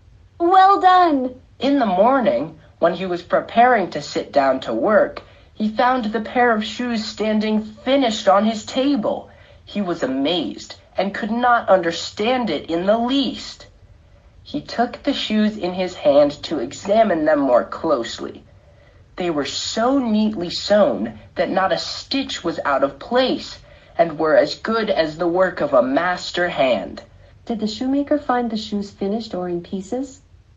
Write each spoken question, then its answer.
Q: Did the shoemaker find the shoes finished or in pieces?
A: Finished.